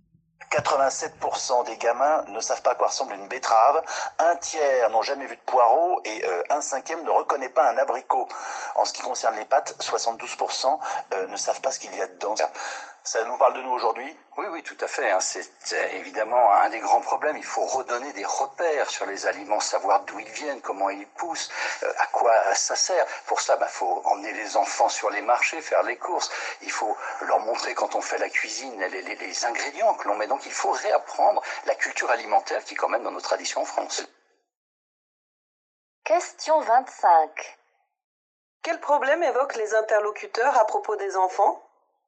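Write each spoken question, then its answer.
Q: Quel problème évoquent les interlocuteurs à propos des enfants?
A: Ils ne connaissent pas les aliments (à quoi ils ressemblent, d'où ils viennent, ce qu'ils contiennent)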